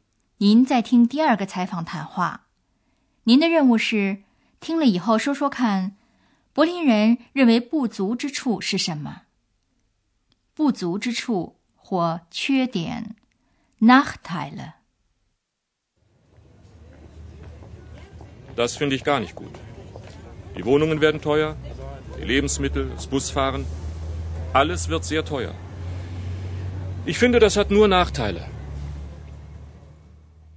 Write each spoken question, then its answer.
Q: 您的任务是听了以后说说看柏林人认为不足之处是什么。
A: 这位柏林人认为不足之处是一切都会变得很贵。